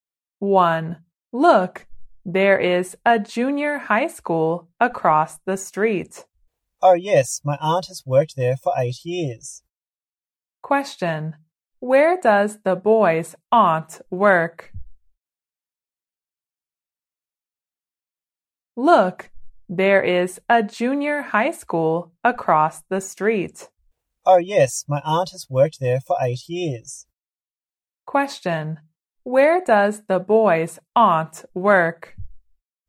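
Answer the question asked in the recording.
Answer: At the junior high school across the street.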